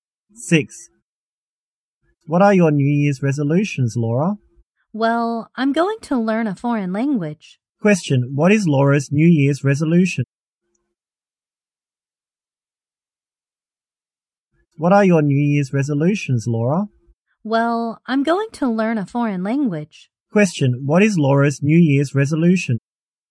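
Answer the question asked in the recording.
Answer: To learn a foreign language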